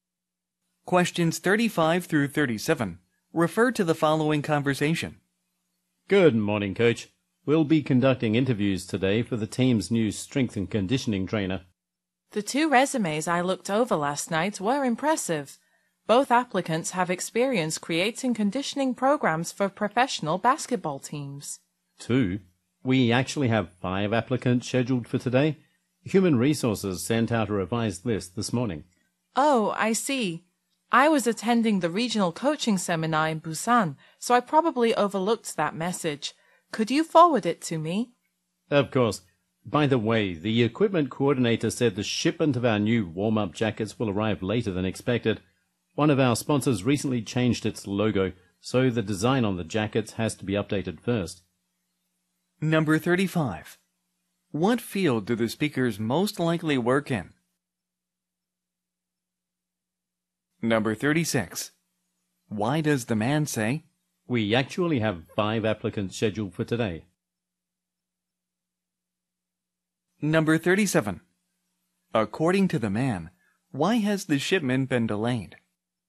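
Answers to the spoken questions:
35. Sports (professional basketball)
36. To correct the woman: there are more applicants than she thought
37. A sponsor changed its logo, so the jacket design must be updated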